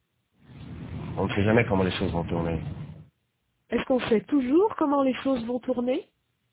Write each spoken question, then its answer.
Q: Est-ce qu'on sait toujours comment les choses vont tourner?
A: Non. On ne sait jamais comment les choses vont tourner.